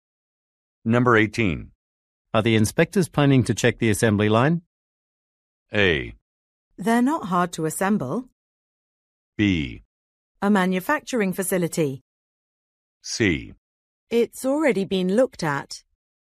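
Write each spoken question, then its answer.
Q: Are the inspectors planning to check the assembly line?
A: C: It's already been looked at.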